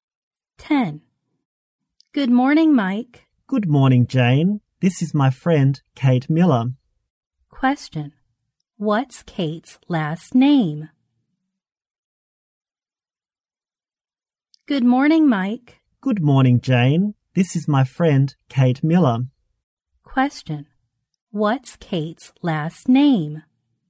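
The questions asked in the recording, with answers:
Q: What's Kate's last name?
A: Miller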